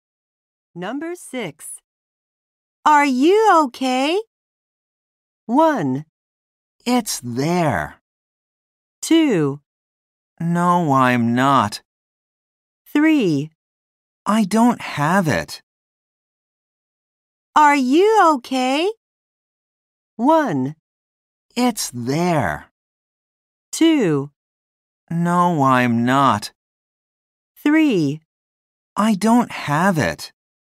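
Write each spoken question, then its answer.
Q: Are you okay?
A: 2: No, I'm not.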